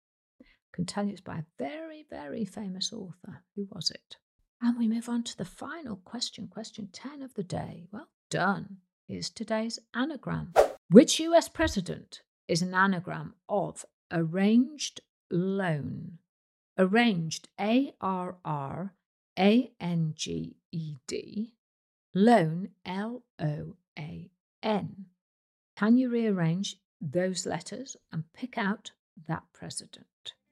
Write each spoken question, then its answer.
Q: Which US president is an anagram of arranged loan?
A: Well, it's the actor who turned into a politician, Ronald Reagan.